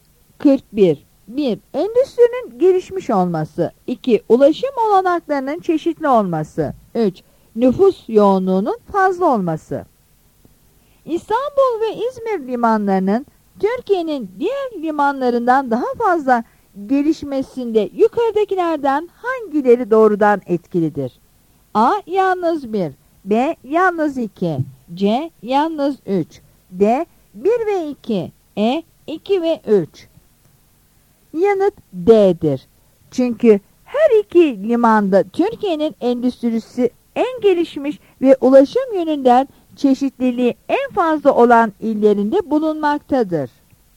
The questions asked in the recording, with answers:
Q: İstanbul ve İzmir limanlarının Türkiye'nin diğer limanlarından daha fazla gelişmesinde yukarıdakilerden hangileri doğrudan etkilidir?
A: Yanıt D'dir.